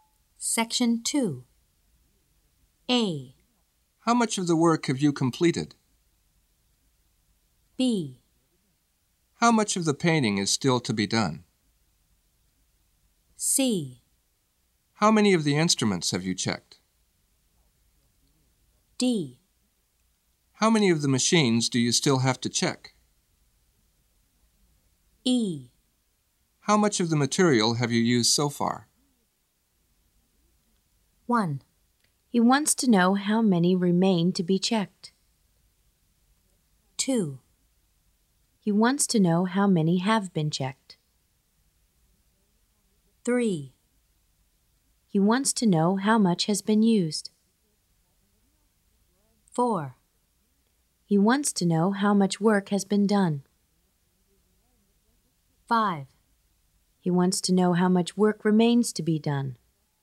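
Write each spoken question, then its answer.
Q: He wants to know how many remain to be checked.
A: D: How many of the machines do you still have to check?

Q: He wants to know how many have been checked.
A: C: How many of the instruments have you checked?

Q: He wants to know how much has been used.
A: E: How much of the material have you used so far?

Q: He wants to know how much work has been done.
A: A: How much of the work have you completed?

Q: He wants to know how much work remains to be done.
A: B: How much of the painting is still to be done?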